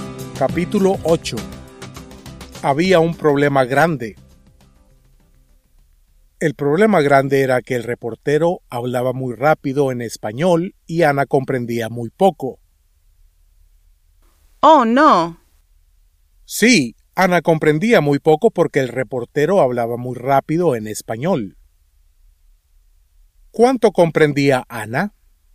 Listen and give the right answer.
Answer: Ana comprendía muy poco.